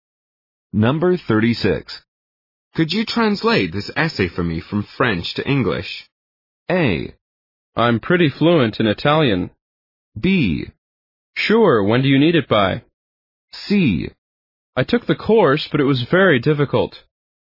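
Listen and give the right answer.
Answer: B: Sure, when do you need it by?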